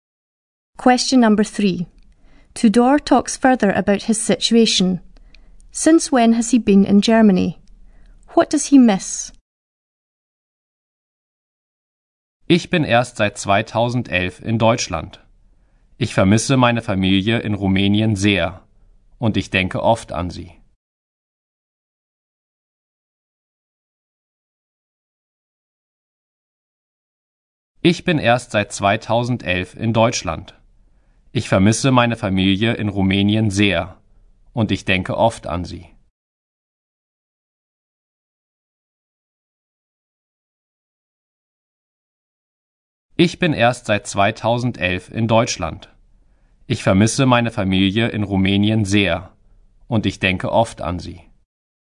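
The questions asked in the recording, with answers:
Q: Since when has he been in Germany?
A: Since 2011

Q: What does he miss?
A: His family in Romania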